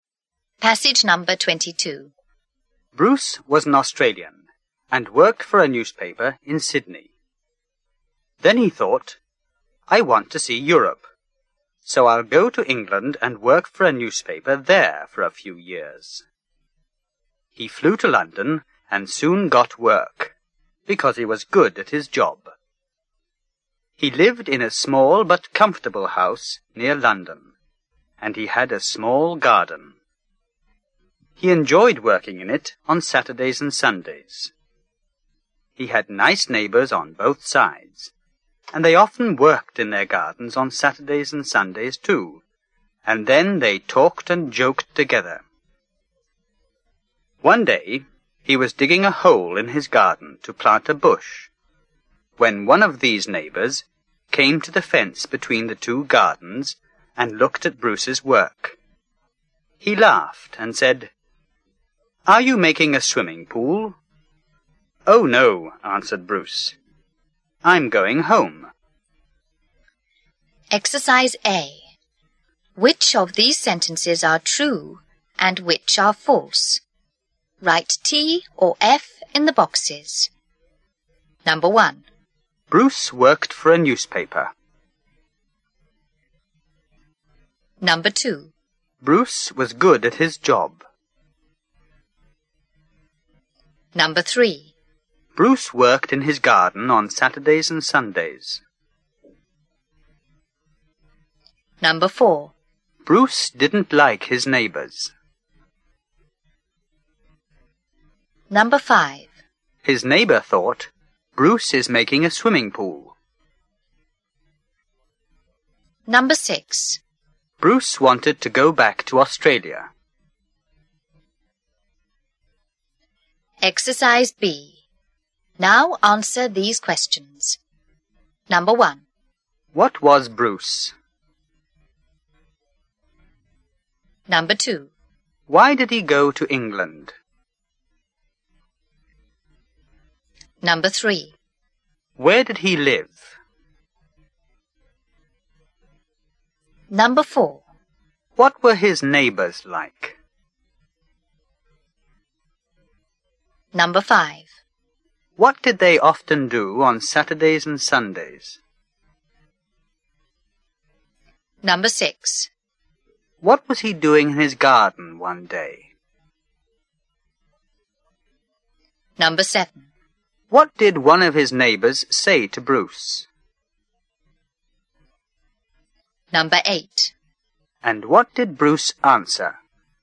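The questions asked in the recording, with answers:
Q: What was Bruce?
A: An Australian who worked for a newspaper

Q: Why did he go to England?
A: He wanted to see Europe

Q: Where did he live?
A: In a small but comfortable house near London

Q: What were his neighbours like?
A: They were nice

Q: What did they often do on Saturdays and Sundays?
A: Worked in their gardens and talked and joked together

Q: What was he doing in his garden one day?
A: Digging a hole to plant a bush

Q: What did one of his neighbours say to Bruce?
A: Are you making a swimming pool?

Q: And what did Bruce answer?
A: Oh, no, I'm going home.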